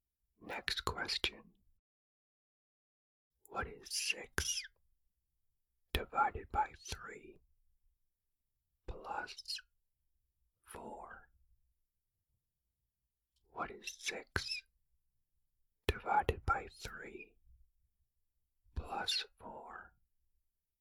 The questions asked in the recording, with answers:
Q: What is 6 divided by 3 plus 4?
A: The answer is 6.